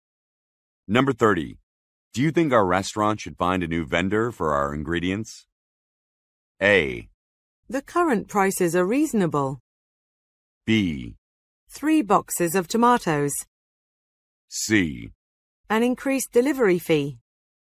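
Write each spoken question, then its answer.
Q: Do you think our restaurant should find a new vendor for our ingredients?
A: A: The current prices are reasonable.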